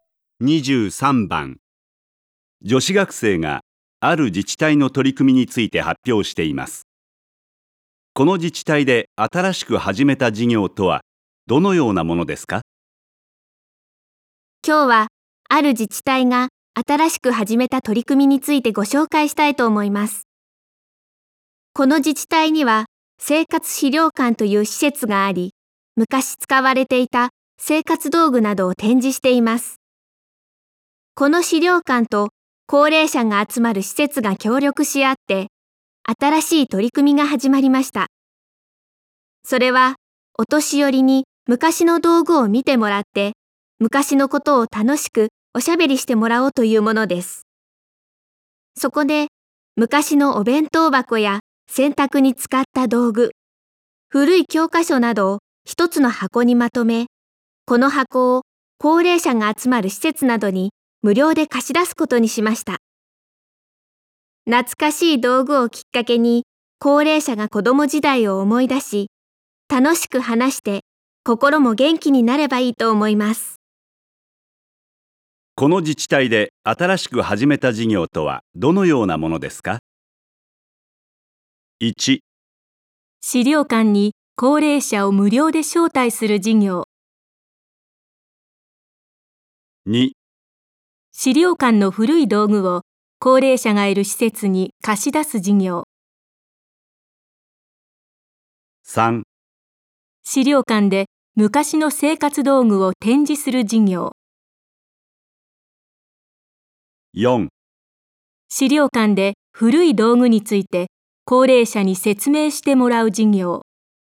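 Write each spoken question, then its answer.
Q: この自治体で新しく始めた事業とはどのようなものですか?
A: 2: 資料館の古い道具を高齢者がいる施設に貸し出す事業。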